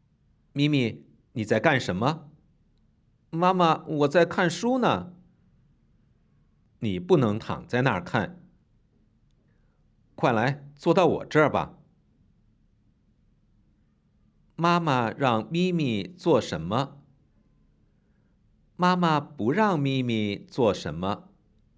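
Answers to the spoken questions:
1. 坐到妈妈那儿
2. 躺着看书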